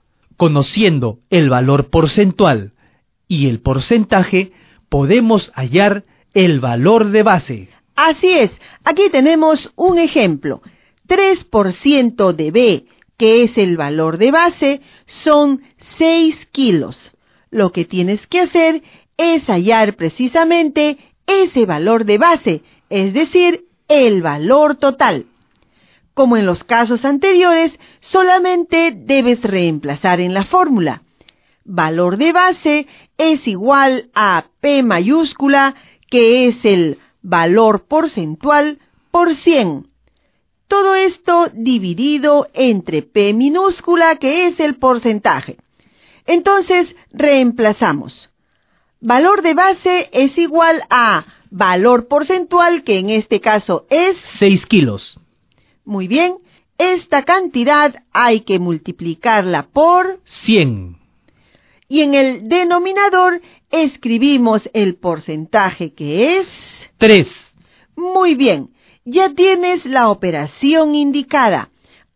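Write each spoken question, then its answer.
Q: 3% de B, que es el valor de base, son 6 kilos.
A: 200 kilos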